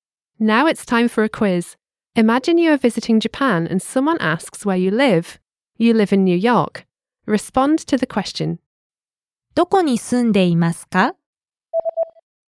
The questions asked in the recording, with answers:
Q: どこに住んでいますか?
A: ニューヨークに住んでいます。